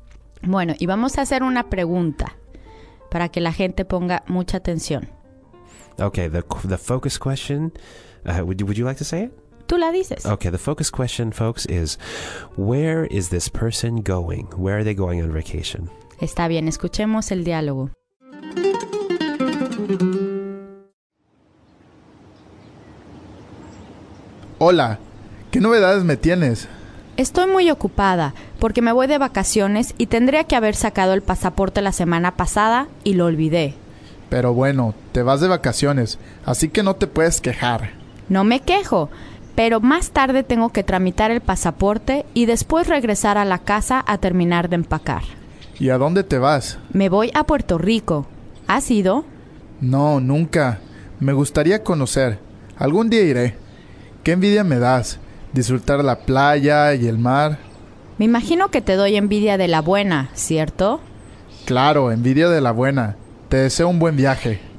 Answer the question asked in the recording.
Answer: Se va a Puerto Rico.